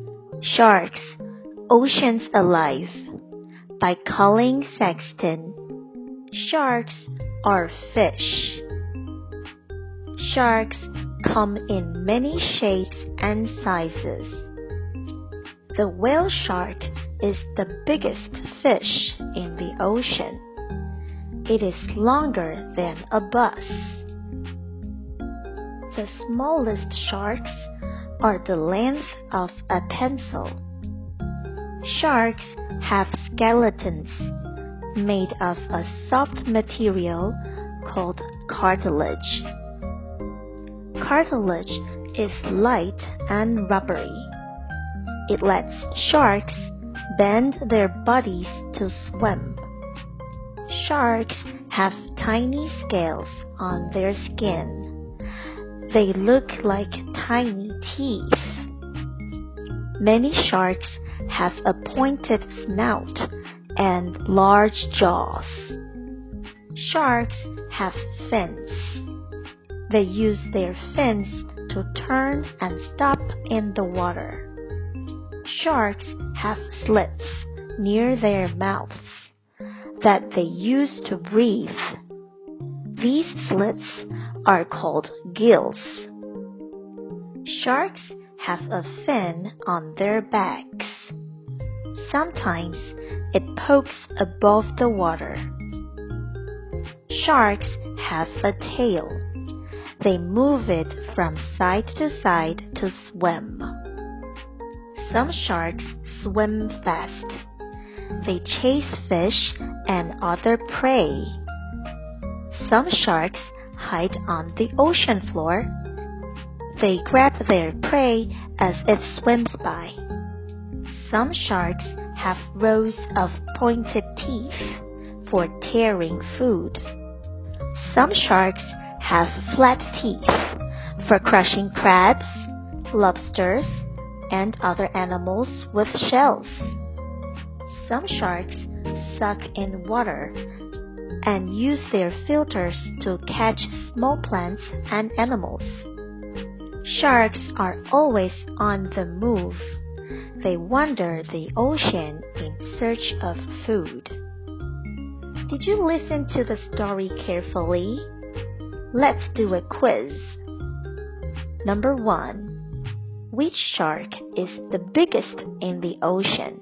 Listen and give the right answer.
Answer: Whale shark.